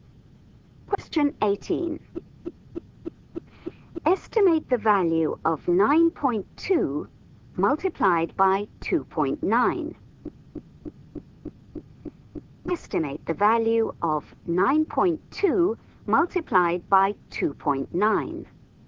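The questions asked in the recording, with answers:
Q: Estimate the value of 9.2 multiplied by 2.9.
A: about 27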